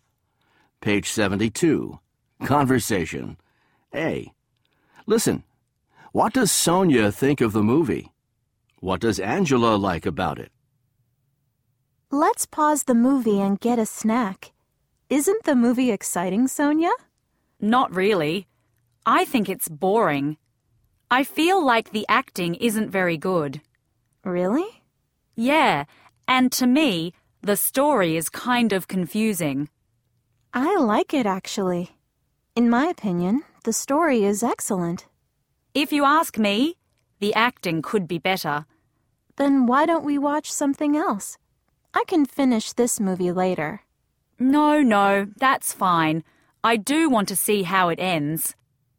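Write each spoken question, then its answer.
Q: What does Sonia think of the movie?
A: She thinks it's boring.

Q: What does Angela like about it?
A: The story; she thinks it's excellent.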